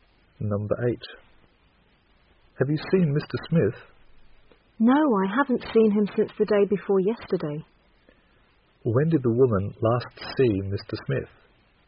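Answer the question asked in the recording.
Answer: The day before yesterday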